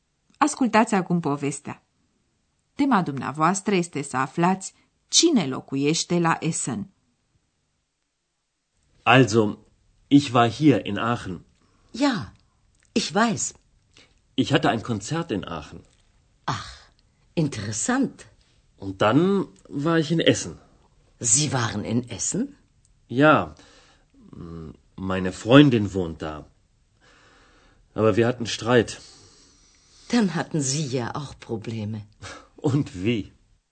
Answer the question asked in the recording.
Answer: Așadar, la Essen locuiește prietena domnului Mayer.